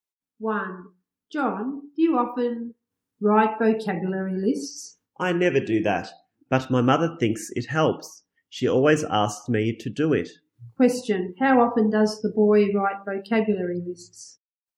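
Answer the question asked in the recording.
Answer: Never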